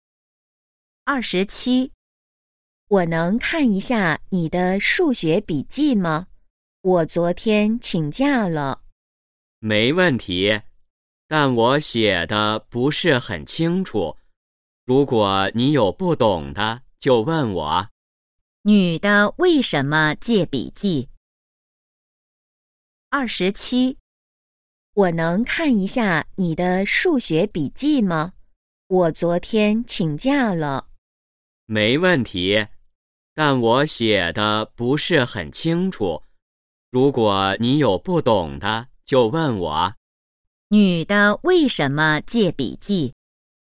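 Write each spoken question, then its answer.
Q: 女的为什么借笔记?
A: 她昨天请假了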